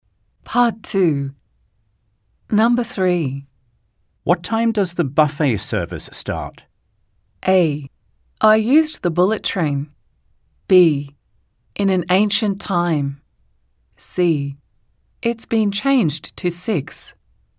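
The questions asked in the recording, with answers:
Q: What time does the buffet service start?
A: C: It's been changed to 6.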